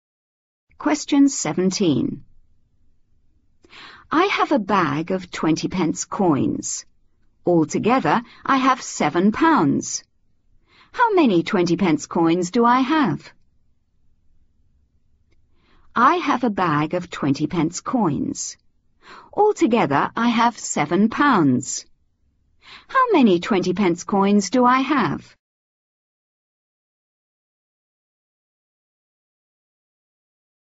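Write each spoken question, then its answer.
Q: Altogether, I have £7. How many 20 pence coins do I have?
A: 35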